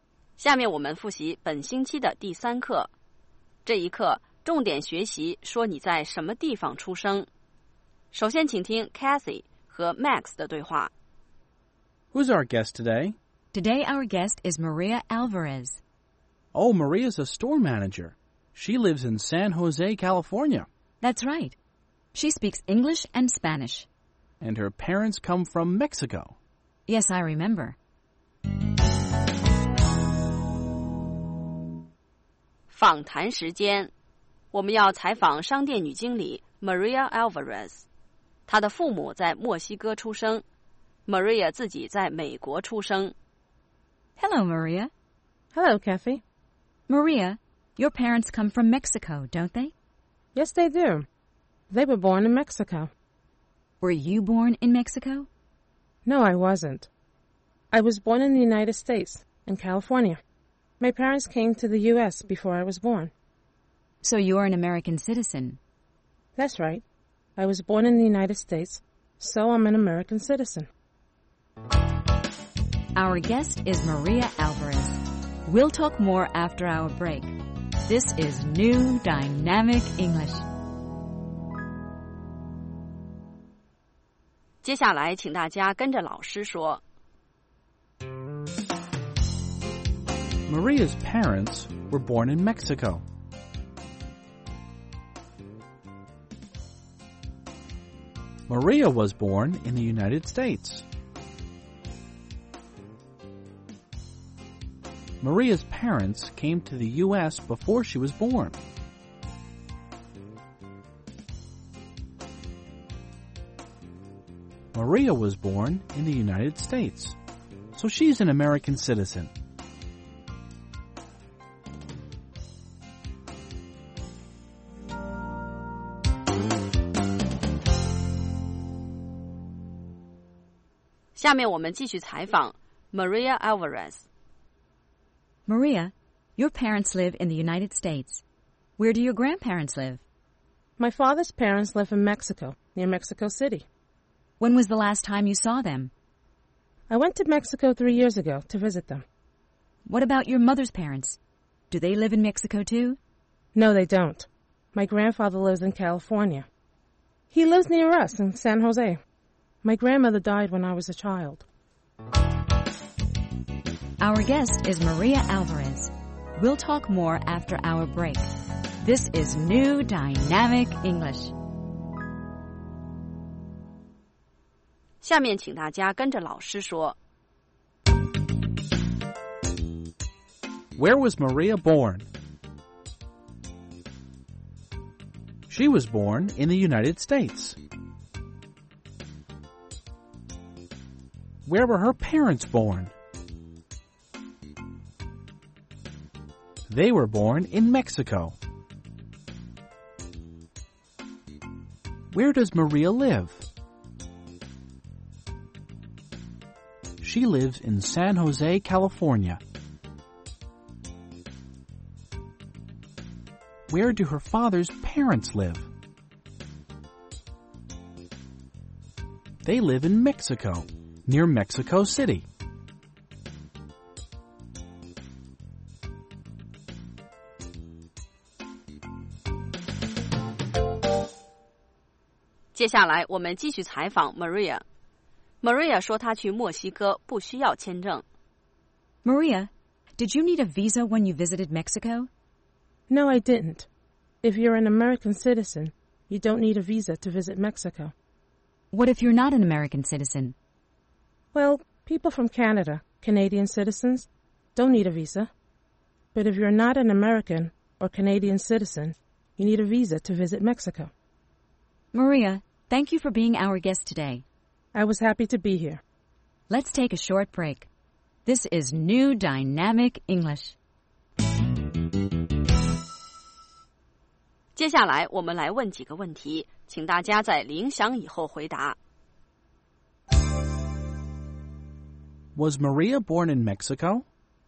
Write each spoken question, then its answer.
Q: Was Maria born in Mexico?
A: No, she wasn't. She was born in the United States.